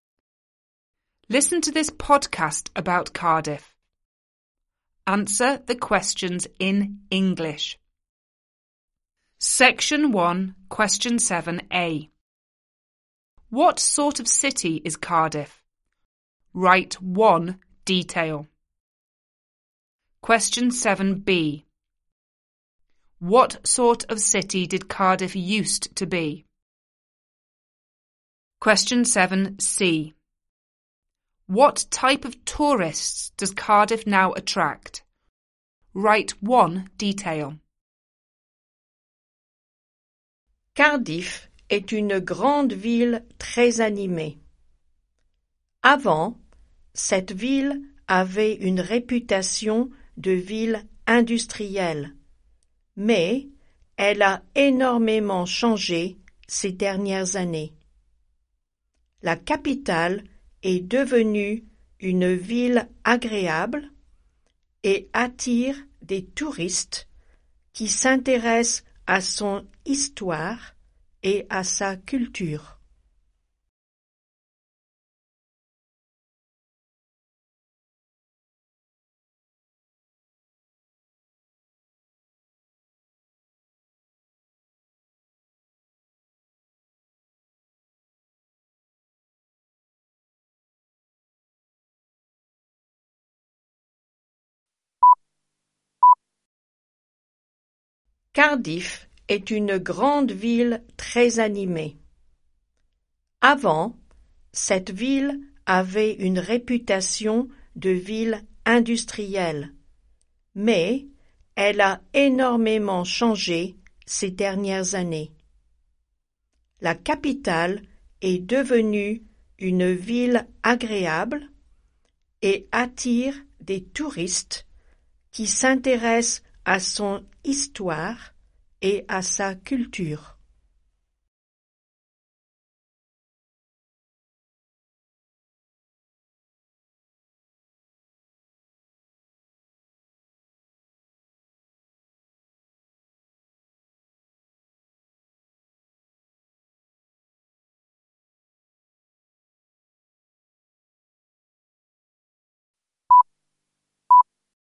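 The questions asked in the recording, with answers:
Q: What sort of city is Cardiff?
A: A big, very lively city

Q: What sort of city did Cardiff used to be?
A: An industrial city

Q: What type of tourists does Cardiff now attract?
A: Tourists interested in its history and culture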